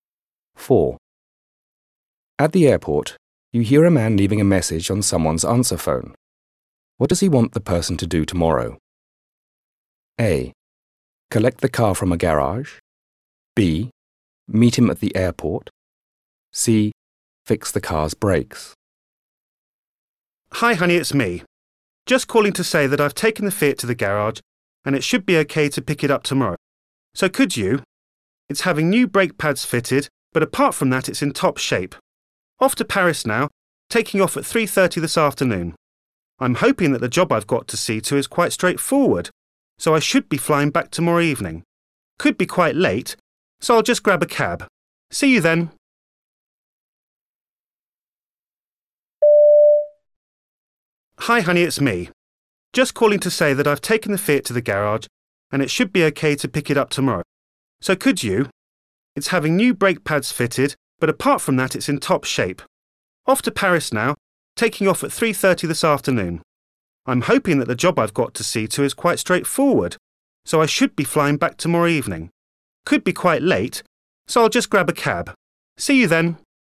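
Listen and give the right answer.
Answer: A: Collect the car from a garage.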